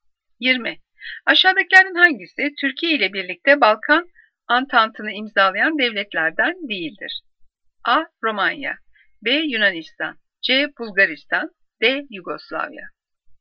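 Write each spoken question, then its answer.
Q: Aşağıdakilerin hangisi Türkiye ile birlikte Balkan Antantı'nı imzalayan devletlerden değildir?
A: C: Bulgaristan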